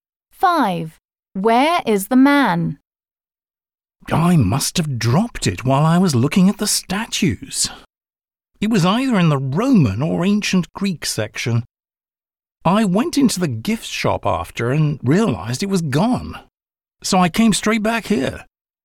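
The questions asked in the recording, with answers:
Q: Where is the man?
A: At a museum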